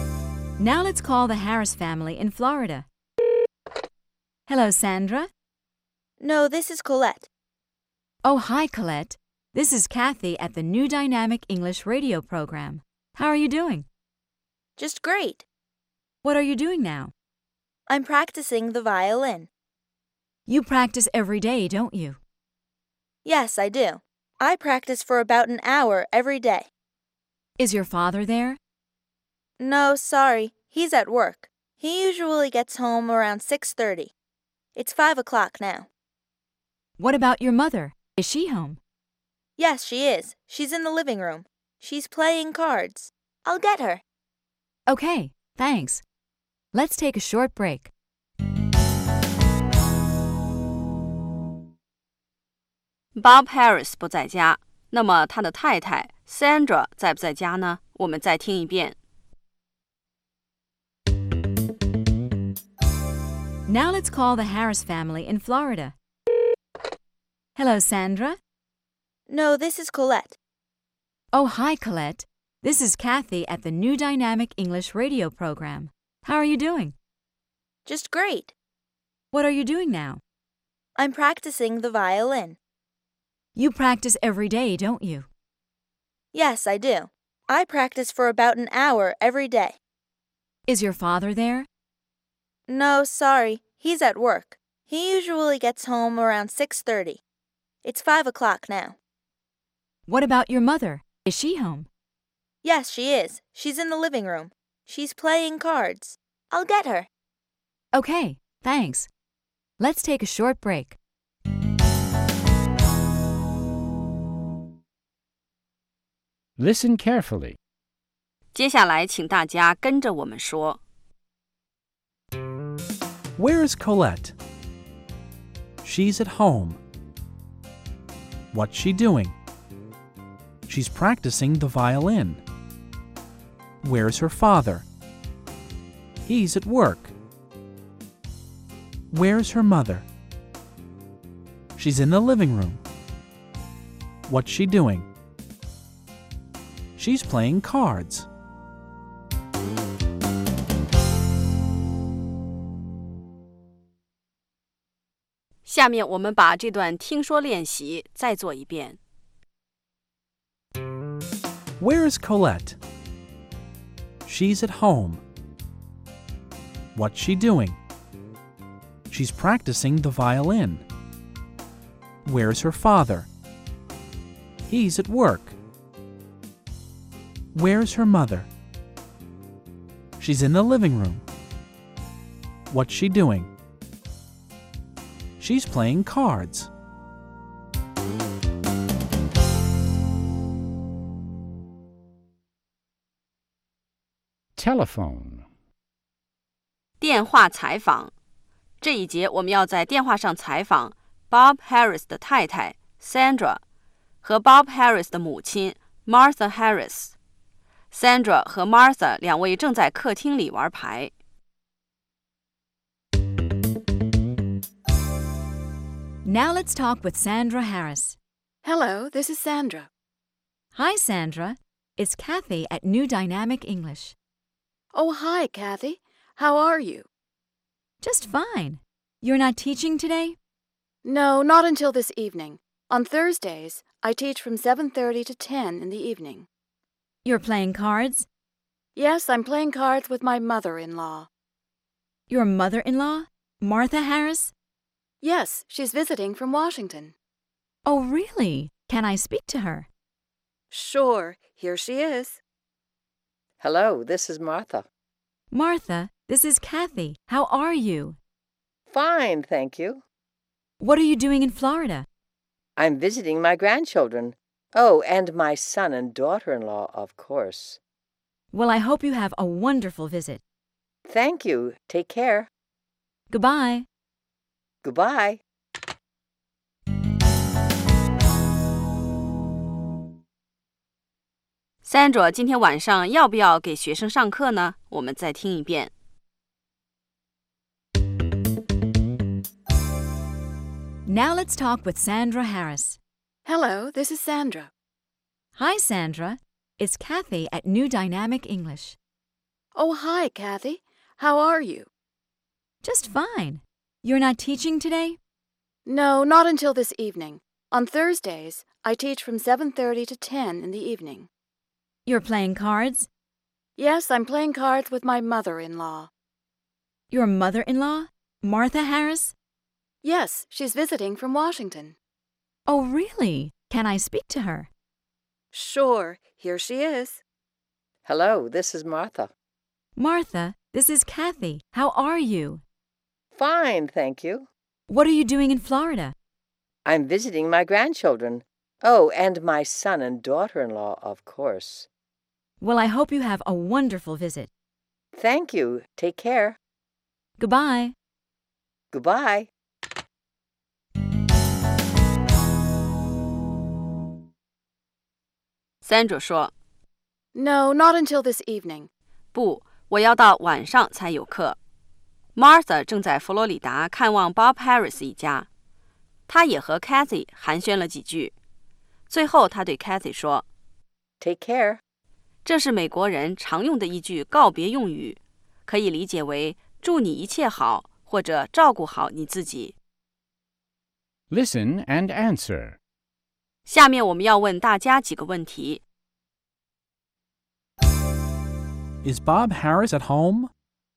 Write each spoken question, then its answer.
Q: Is Bob Harris at home?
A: No, he isn't. He's at work.